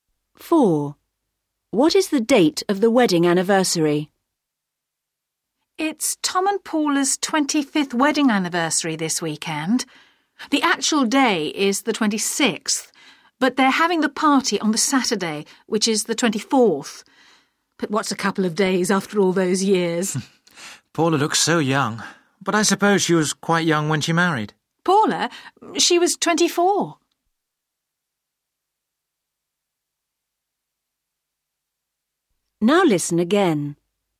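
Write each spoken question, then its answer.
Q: What is the date of the wedding anniversary?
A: The 26th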